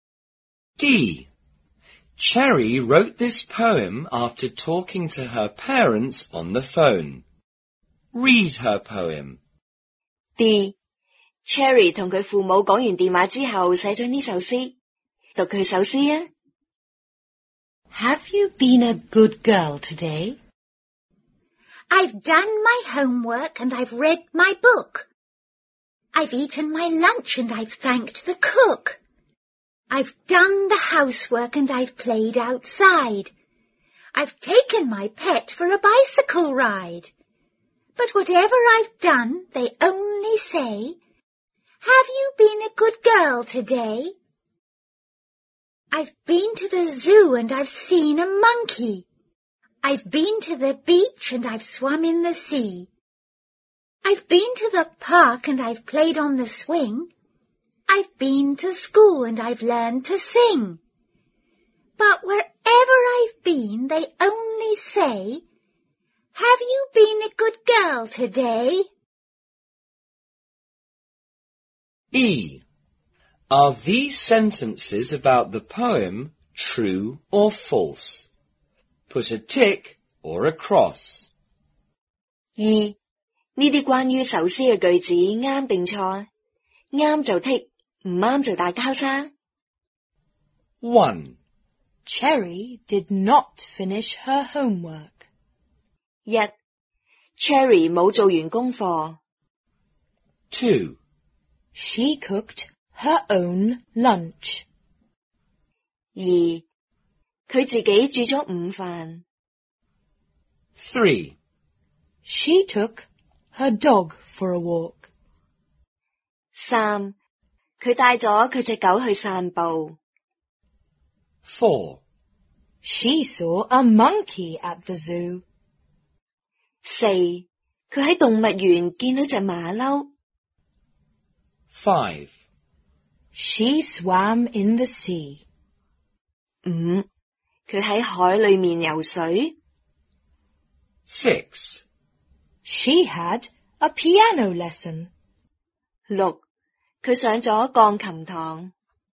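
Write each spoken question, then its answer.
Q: Cherry did not finish her homework.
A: False

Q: she cooked her own lunch.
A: False

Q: she saw a monkey at the zoo.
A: True

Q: she swam in the sea.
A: True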